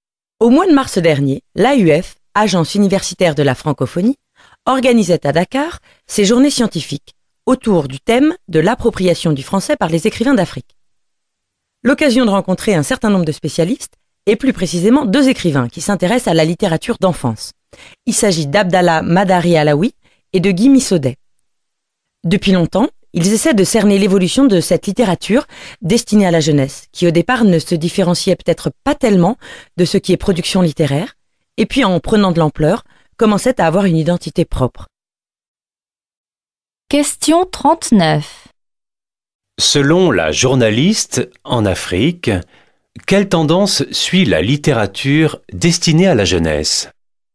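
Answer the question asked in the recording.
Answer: Elle prend de l'ampleur et commence à avoir une identité propre, distincte du reste de la production littéraire.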